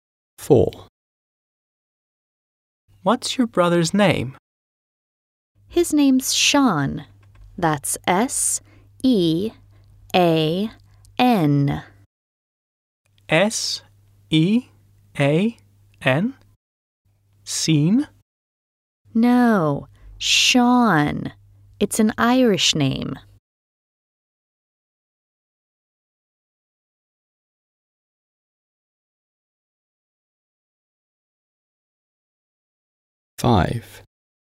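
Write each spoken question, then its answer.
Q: What's your brother's name?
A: Sean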